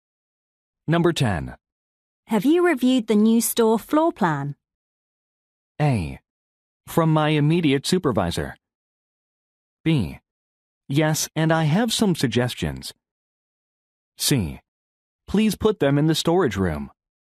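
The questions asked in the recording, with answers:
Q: Have you reviewed the new store floor plan?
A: B: Yes, and I have some suggestions.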